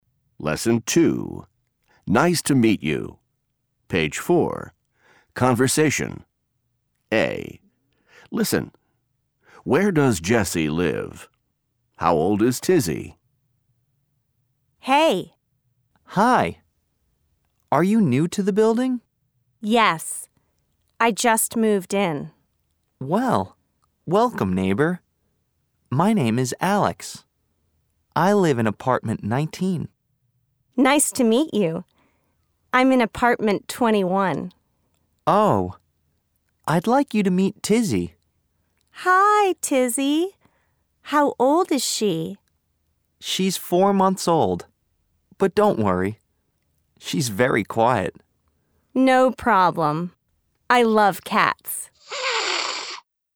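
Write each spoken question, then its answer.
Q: How old is Tizzy?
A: 4 months old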